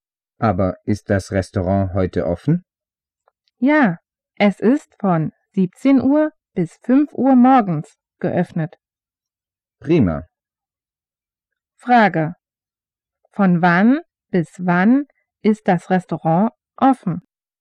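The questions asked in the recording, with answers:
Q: Von wann bis wann ist das Restaurant offen?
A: Von 17 Uhr bis 5 Uhr morgens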